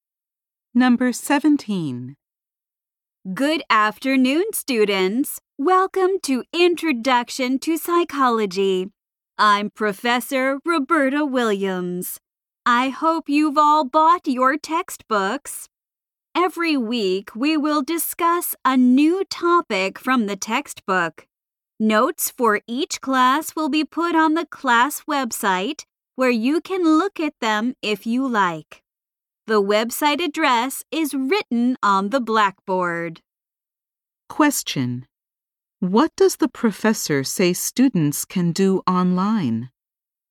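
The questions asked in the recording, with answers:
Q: What does the professor say students can do online?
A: Look at the notes for each class.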